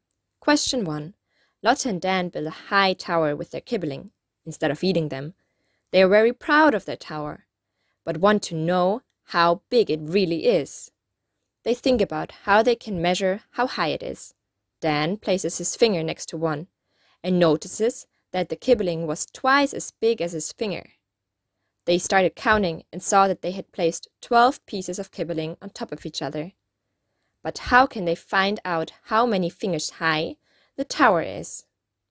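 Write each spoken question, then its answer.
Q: But how can they find out how many fingers high the tower is?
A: Multiply the 12 pieces by 2 fingers each: the tower is 24 fingers high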